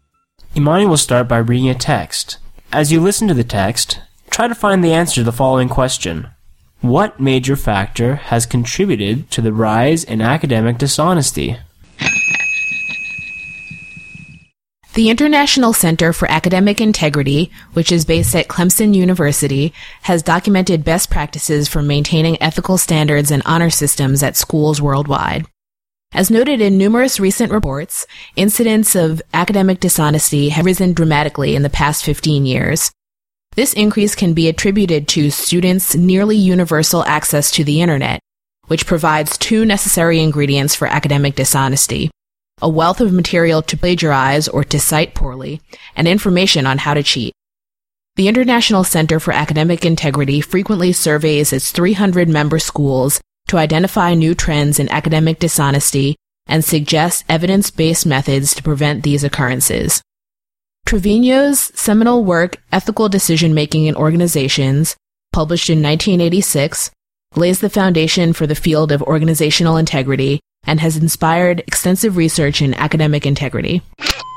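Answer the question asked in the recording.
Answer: Students' nearly universal access to the internet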